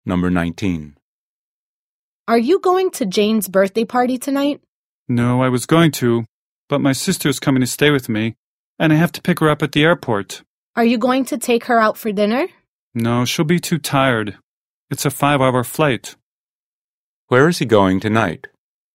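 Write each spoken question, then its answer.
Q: Where is he going tonight?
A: To the airport, to pick up his sister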